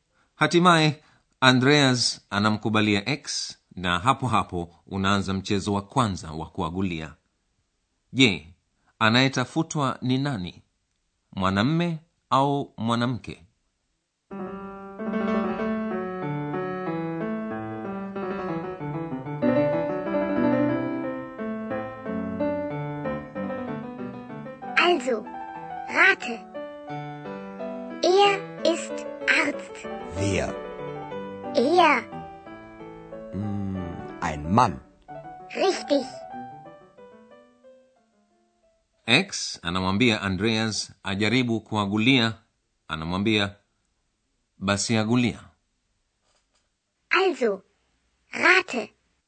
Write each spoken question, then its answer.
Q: Je, anayetafutwa ni nani? Mwanamme au mwanamke?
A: Andreas anaagulia kuwa mtu anayetafutwa ni mwanamme